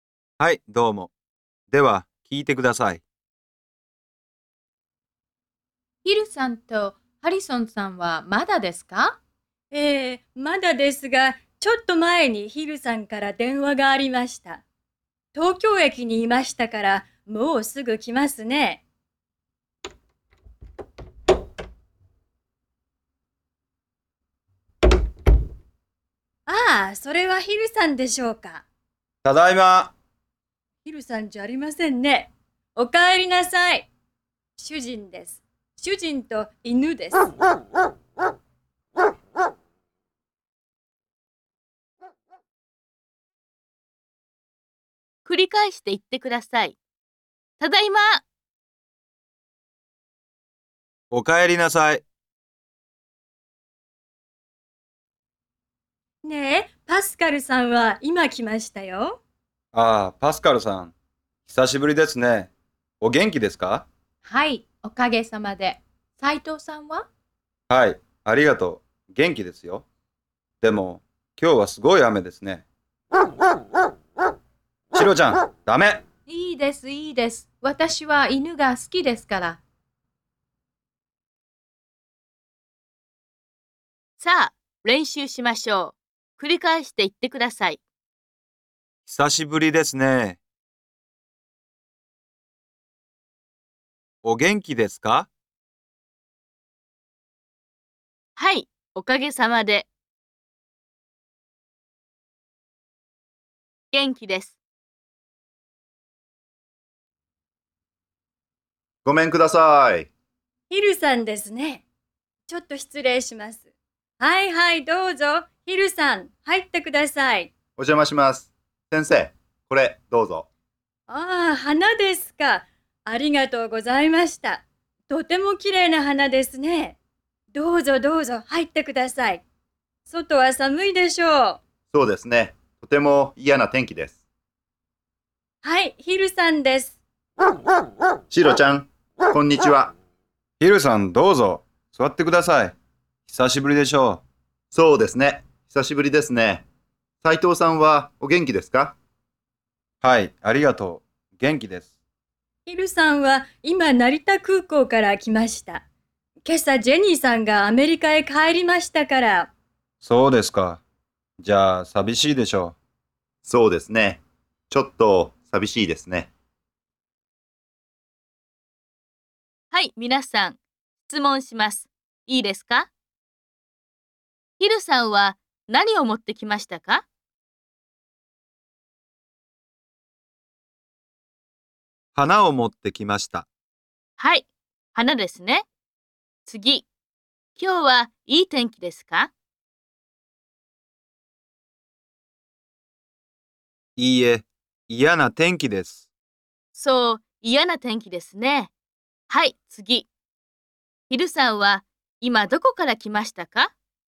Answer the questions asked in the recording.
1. 花を持ってきました。
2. いいえ、嫌な天気です。
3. 成田空港から来ました。